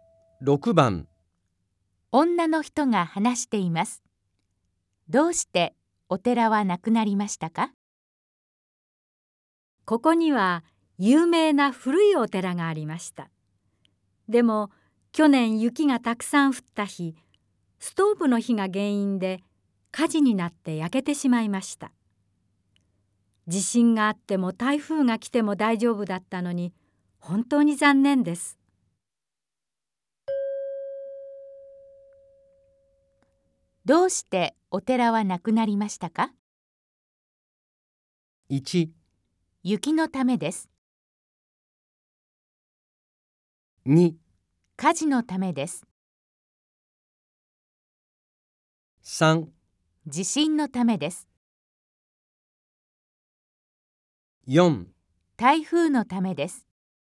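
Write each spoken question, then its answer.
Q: どうしてお寺はなくなりましたか?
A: 2: 火事のためです。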